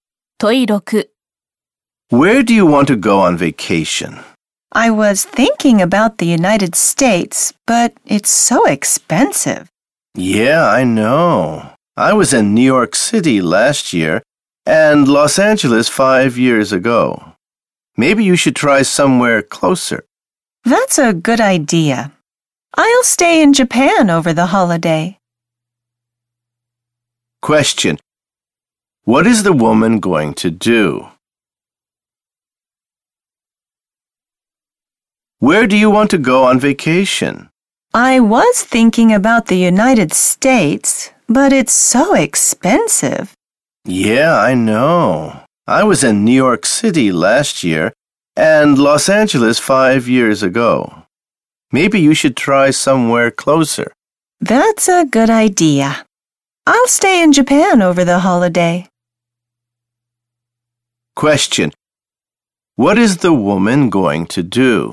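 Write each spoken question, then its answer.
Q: What is the woman going to do?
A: Stay in Japan over the holiday.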